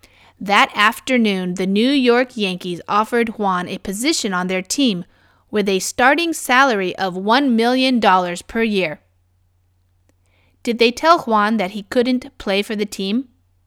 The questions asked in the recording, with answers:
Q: Did they tell Juan that he couldn't play for the team?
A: No, they didn't tell him that.